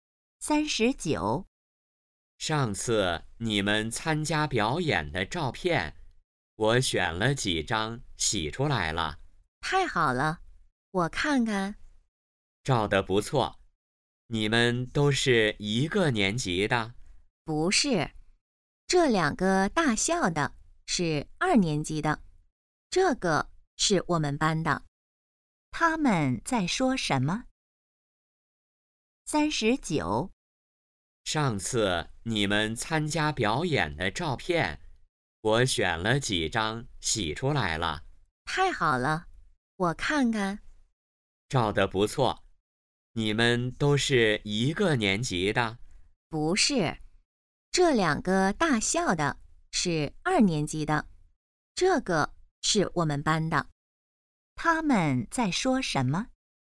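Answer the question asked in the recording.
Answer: 表演的照片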